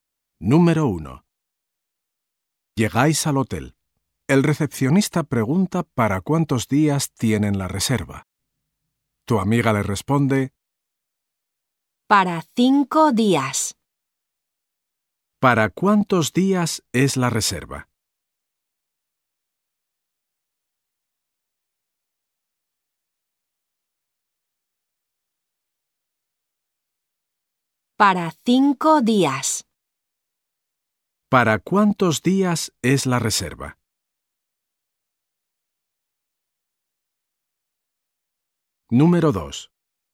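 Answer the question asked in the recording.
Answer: Para 5 días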